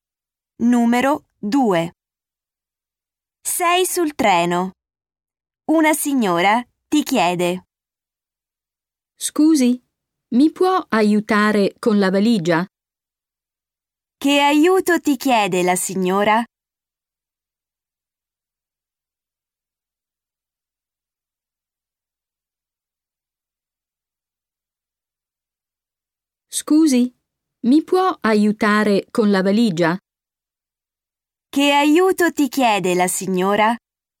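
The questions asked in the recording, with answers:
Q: Che aiuto ti chiede la signora?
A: Aiutarla con la valigia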